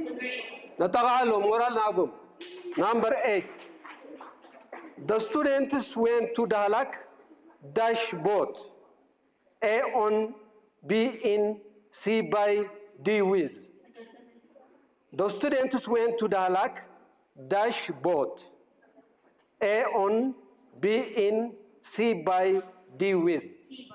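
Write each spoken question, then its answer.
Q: The students went to Dalak dash boat.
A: C: by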